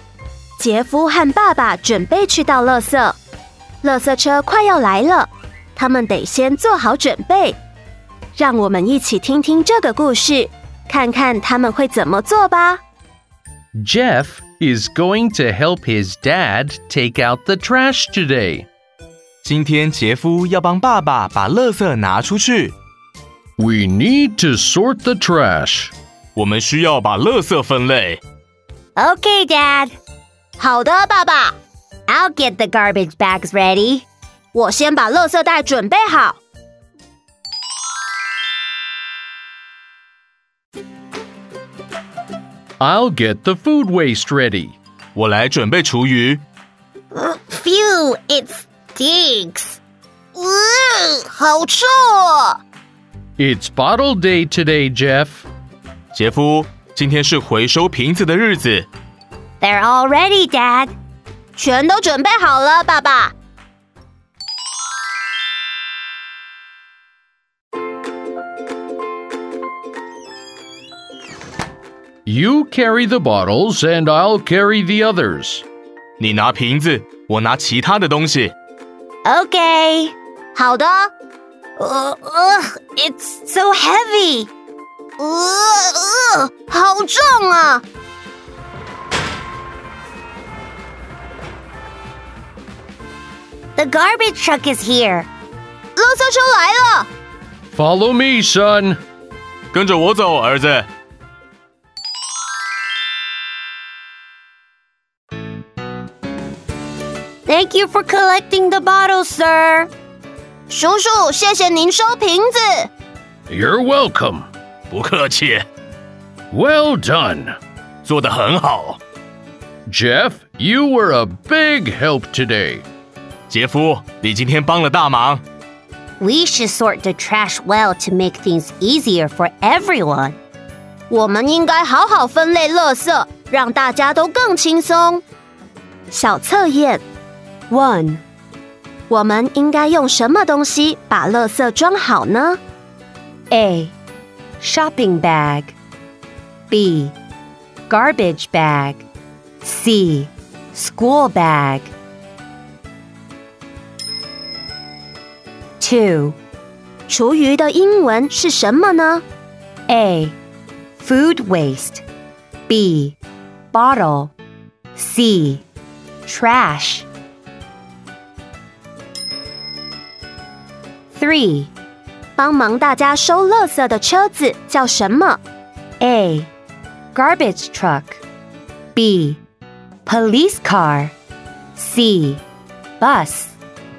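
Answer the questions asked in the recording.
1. B: garbage bag
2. A: Food waste
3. A: Garbage truck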